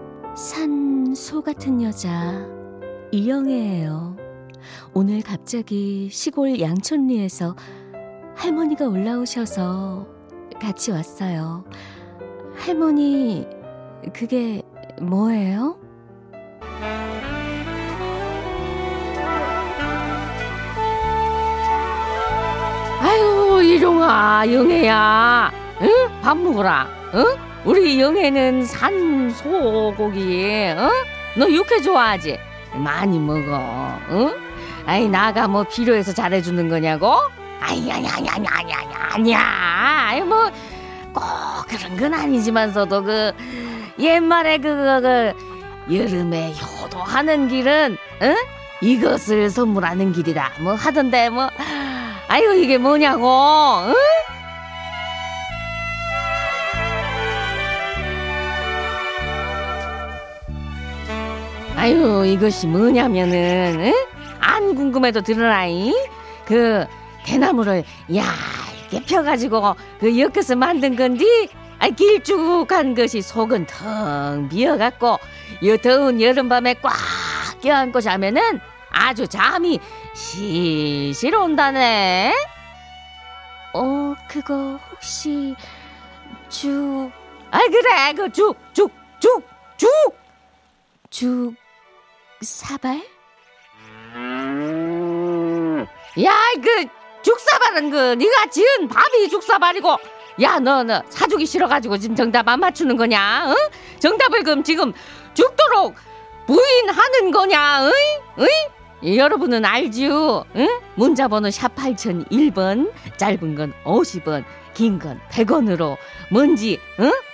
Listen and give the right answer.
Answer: 죽부인이요